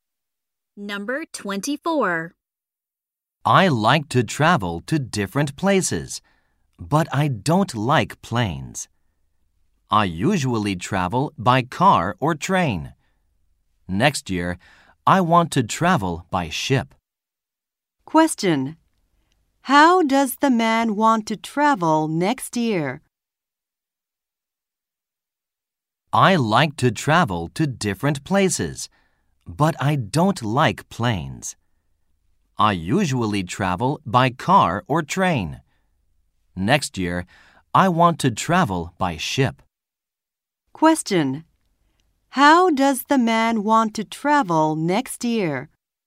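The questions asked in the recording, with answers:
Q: How does the man want to travel next year?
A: By ship.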